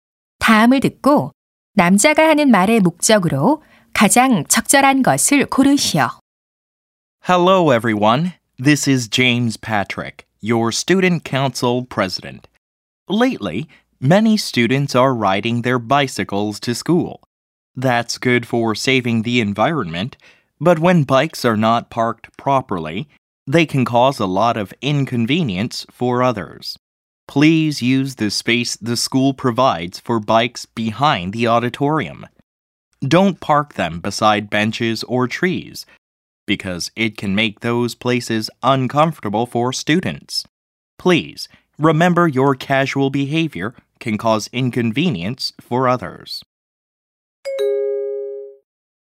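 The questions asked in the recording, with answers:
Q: 다음을 듣고 남자가 하는 말의 목적으로 가장 적절한 것을 고르시오.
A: 자전거를 지정된 장소(강당 뒤)에 주차하도록 당부하려고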